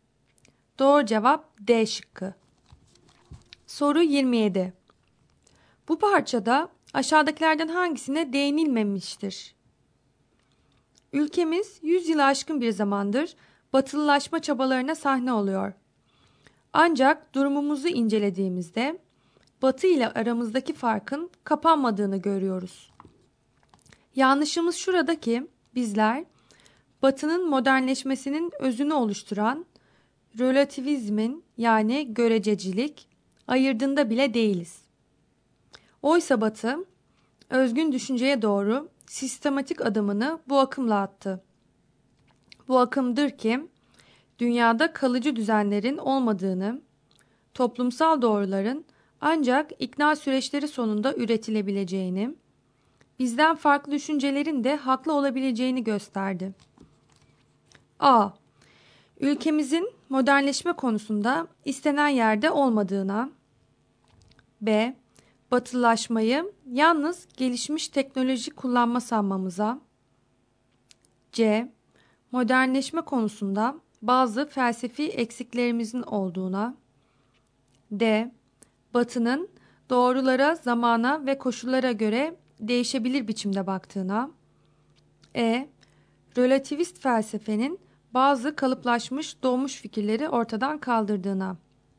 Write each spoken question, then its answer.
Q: Bu parçada aşağıdakilerden hangisine değinilmemiştir?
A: Doğru cevap B şıkkı.